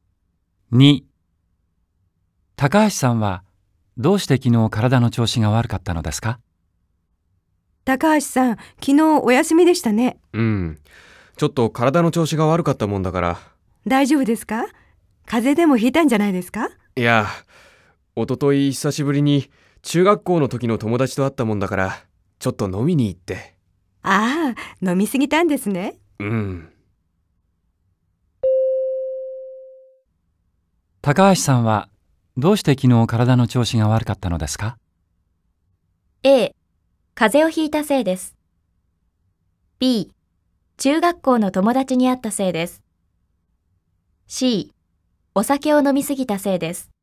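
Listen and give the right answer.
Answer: A: ×、B: ×、C: ○(お酒を飲みすぎたせいです)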